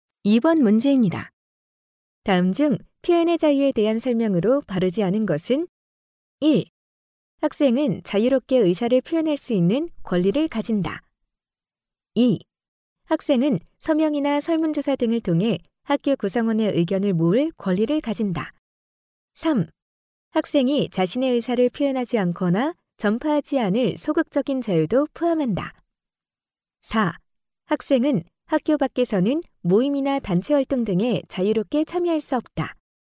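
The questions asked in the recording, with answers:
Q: 다음 중 표현의 자유에 대한 설명으로 바르지 않은 것은?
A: 4: 학생은 학교 밖에서는 모임이나 단체 활동 등에 자유롭게 참여할 수 없다.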